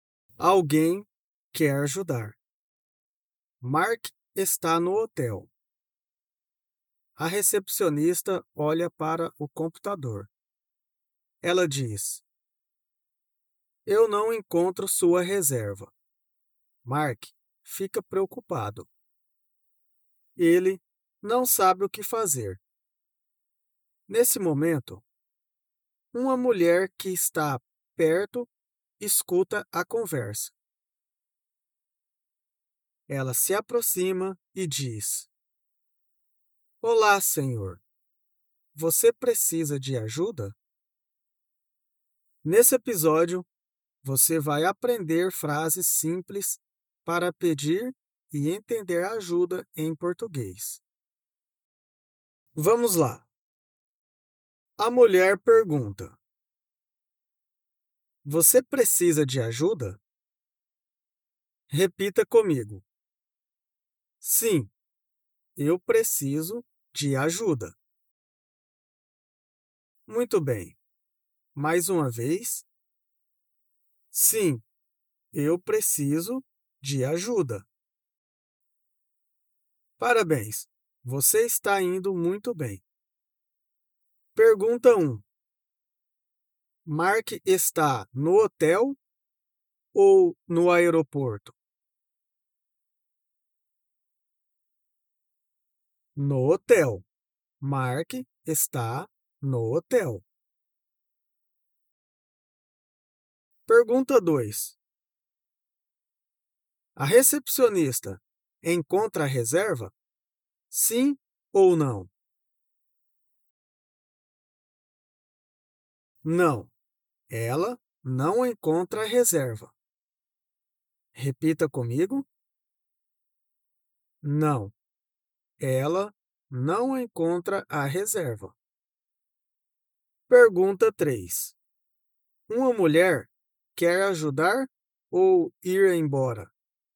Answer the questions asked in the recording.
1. No hotel. Mark está no hotel.
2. Não. Ela não encontra a reserva.
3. Ela quer ajudar. A mulher me ajuda.